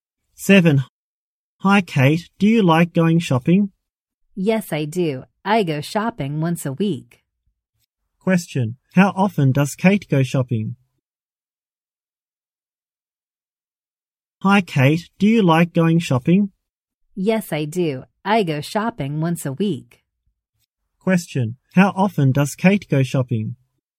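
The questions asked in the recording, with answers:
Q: How often does Kate go shopping?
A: Once a week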